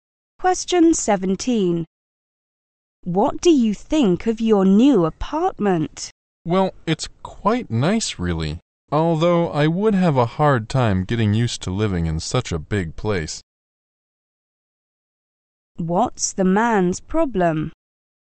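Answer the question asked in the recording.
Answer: He finds it hard to get used to such a big apartment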